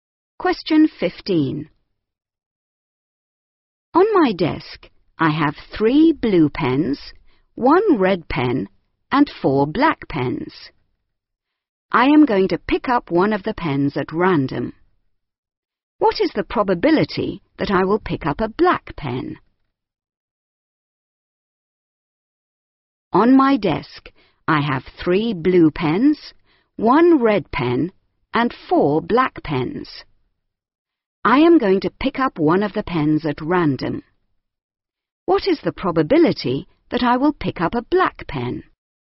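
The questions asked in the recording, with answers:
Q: What is the probability that I will pick up a black pen?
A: 1/2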